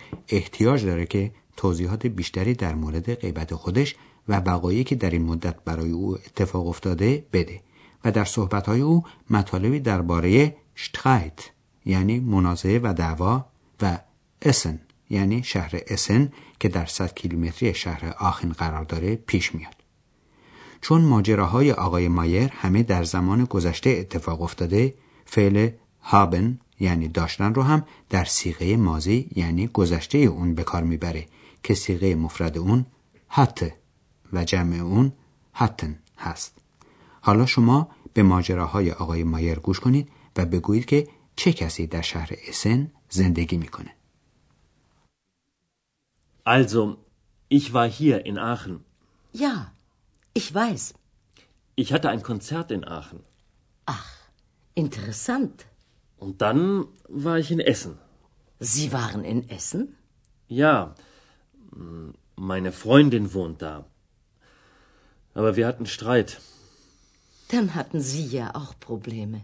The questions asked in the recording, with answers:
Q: حالا شما به ماجراهای آقای مایر گوش کنید و بگویید که چه کسی در شهر اسن زندگی میکنه.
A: Pas dar shahr Essen dost dokhtar aghay Mayer zendegi mikone.